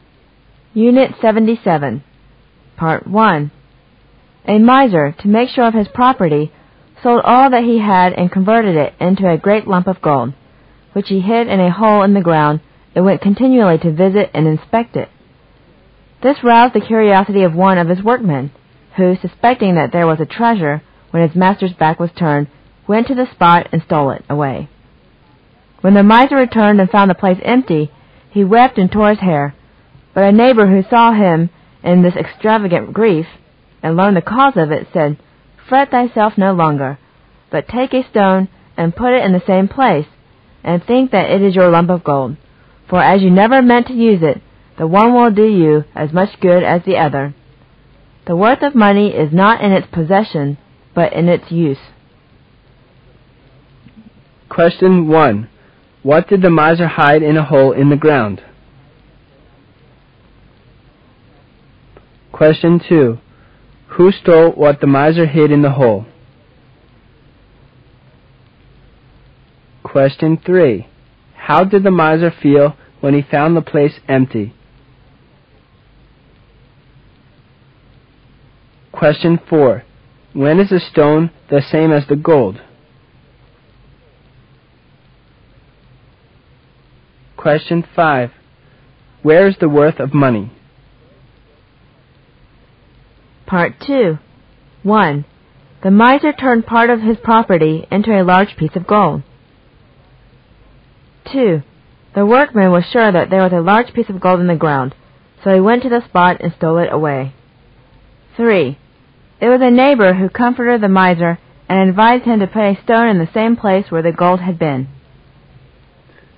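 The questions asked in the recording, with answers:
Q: What did the miser hide in a hole in the ground?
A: A great lump of gold

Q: Who stole what the miser hid in the hole?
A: One of his workmen

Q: How did the miser feel when he found the place empty?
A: Extremely grieved

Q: When is the stone the same as the gold?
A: When you never mean to use it

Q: Where is the worth of money?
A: In its use

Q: The miser turned part of his property into a large piece of gold.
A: False

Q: The workman was sure that there was a large piece of gold in the ground, so he went to the spot and stole it away.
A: False

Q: It was a neighbor who comforted the miser and advised him to put a stone in the same place where the gold had been.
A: True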